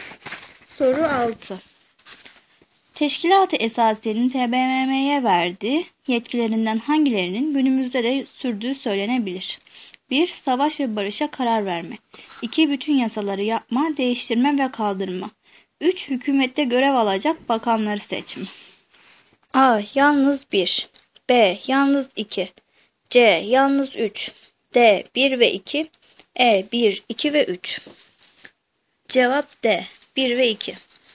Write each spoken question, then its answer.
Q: Teşkilat-ı Esasiye'nin TBMM'ye verdiği yetkilerinden hangilerinin günümüzde de sürdüğü söylenebilir?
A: Cevap D. 1 ve 2.